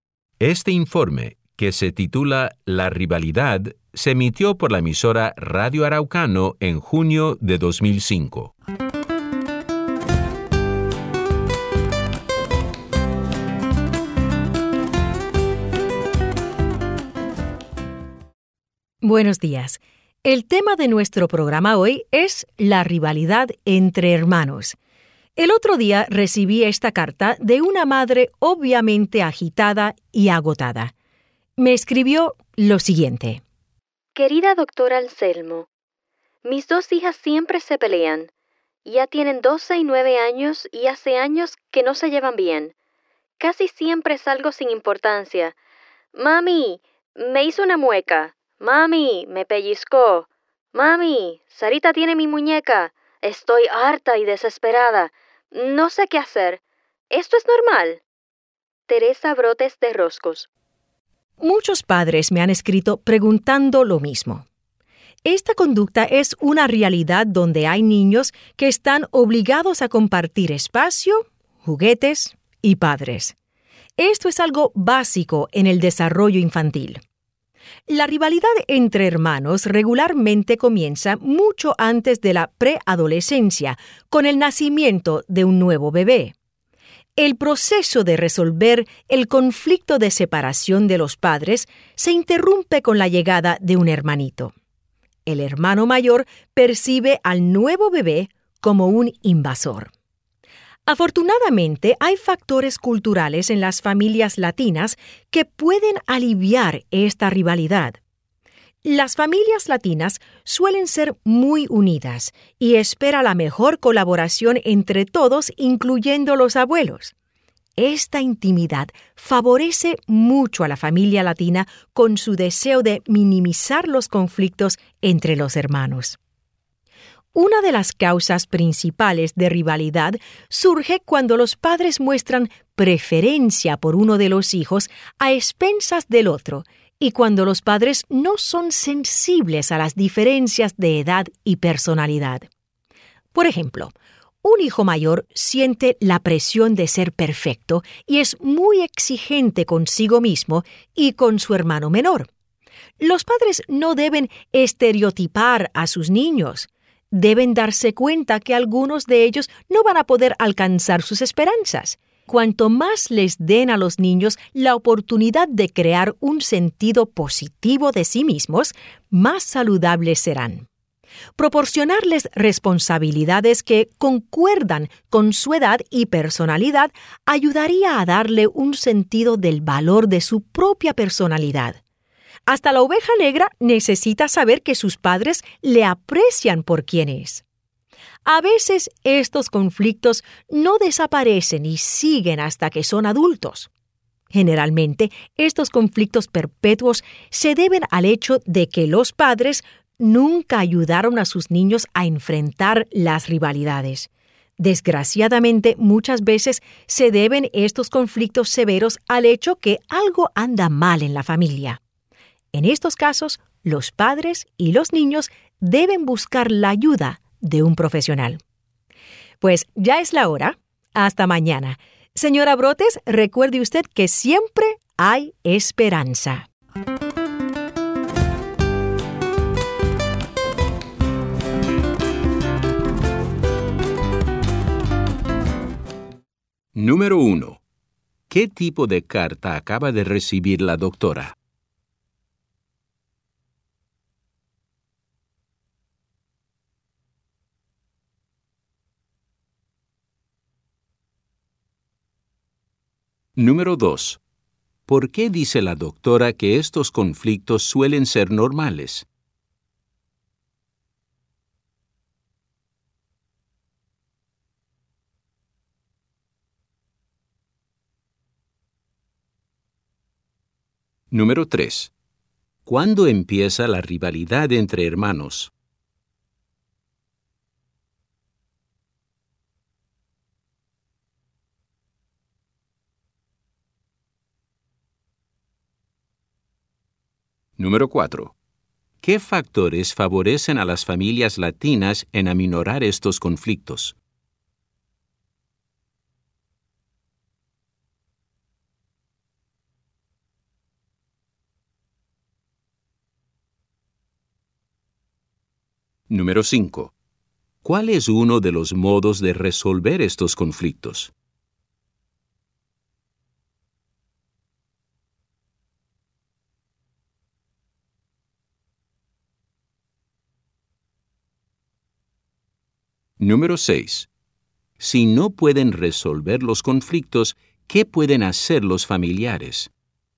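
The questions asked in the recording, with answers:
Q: ¿Qué tipo de carta acaba de recibir la doctora?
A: Una carta de una madre agitada y agotada por las peleas de sus hijas

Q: ¿Por qué dice la doctora que estos conflictos suelen ser normales?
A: Porque los niños están obligados a compartir espacio, juguetes y padres; es algo básico en el desarrollo infantil

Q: ¿Cuándo empieza la rivalidad entre hermanos?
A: Con el nacimiento de un nuevo bebé

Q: ¿Qué factores favorecen a las familias latinas en aminorar estos conflictos?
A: Son familias muy unidas que esperan la colaboración de todos, incluidos los abuelos

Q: ¿Cuál es uno de los modos de resolver estos conflictos?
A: Darles responsabilidades que concuerden con su edad y personalidad

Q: Si no pueden resolver los conflictos, ¿qué pueden hacer los familiares?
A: Buscar la ayuda de un profesional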